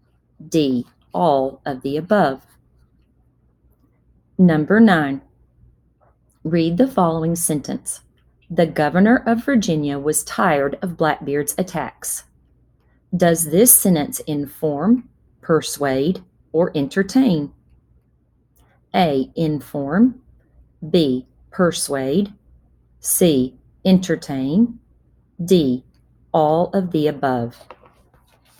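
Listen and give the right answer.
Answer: A: Inform.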